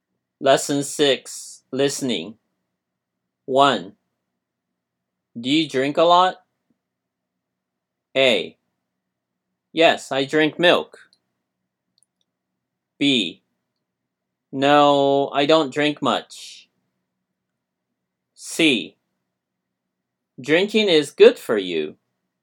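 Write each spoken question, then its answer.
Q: Do you drink a lot?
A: B: No, I don't drink much.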